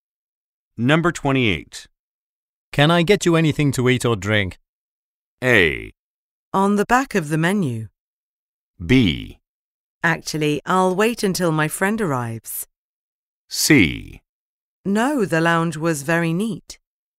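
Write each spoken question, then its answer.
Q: Can I get you anything to eat or drink?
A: B: Actually, I'll wait until my friend arrives.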